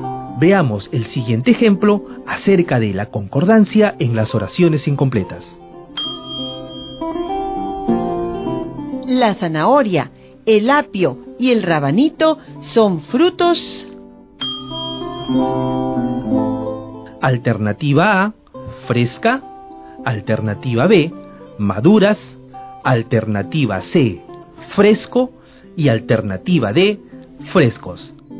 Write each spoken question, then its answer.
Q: La zanahoria, el apio y el rabanito son frutos.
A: Yo creo que la palabra que encaja en esta oración es la alternativa D, frescos.